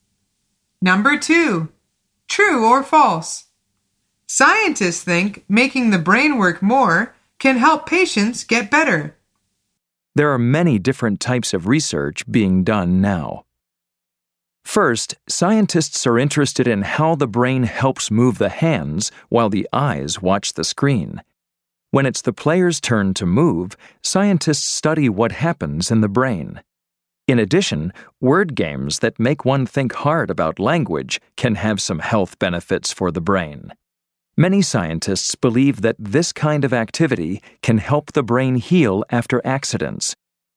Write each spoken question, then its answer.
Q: True or false? Scientists think making the brain work more can help patients get better.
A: The answer is true.